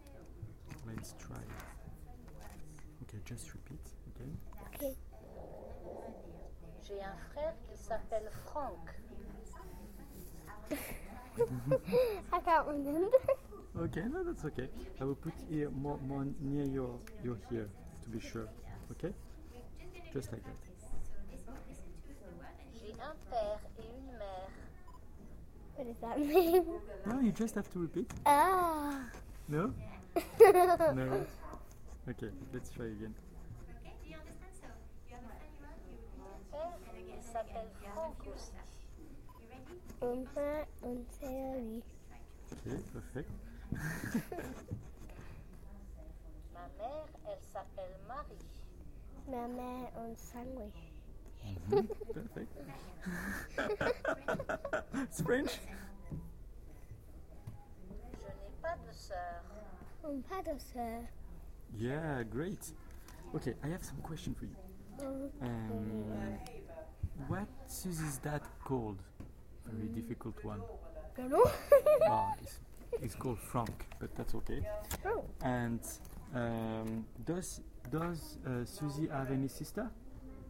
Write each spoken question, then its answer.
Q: And does Susie have any sister?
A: No, she doesn't.